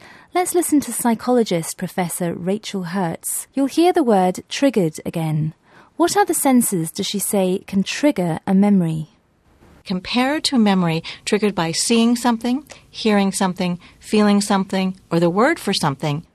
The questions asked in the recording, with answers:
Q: What other senses does she say can trigger a memory?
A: She mentioned that memories can be triggered by seeing, hearing, feeling, or hearing the word for something.